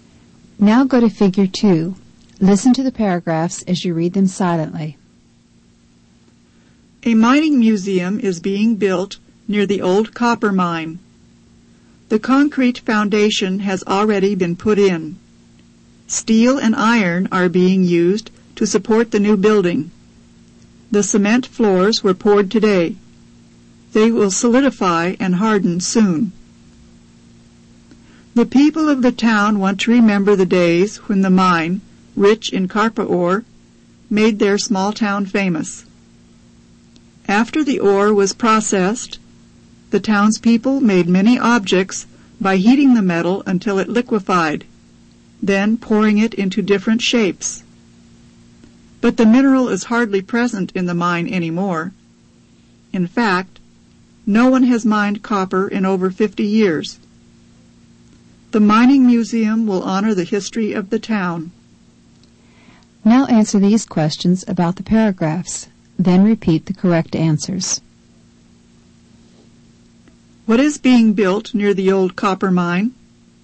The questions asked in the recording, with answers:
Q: What is being built near the old copper mine?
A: A mining museum is being built near the old copper mine.